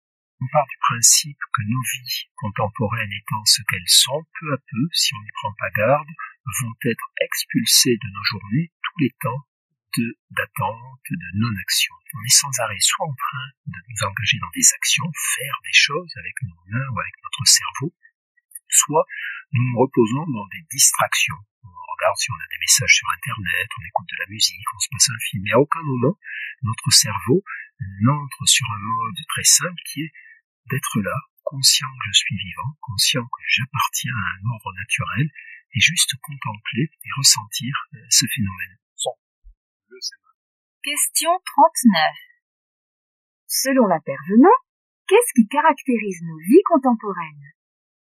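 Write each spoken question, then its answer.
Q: Selon l'intervenant, qu'est-ce qui caractérise nos vies contemporaines ?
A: Les temps d'attente et de non-action en disparaissent peu à peu : on est sans cesse occupé à agir ou à se distraire.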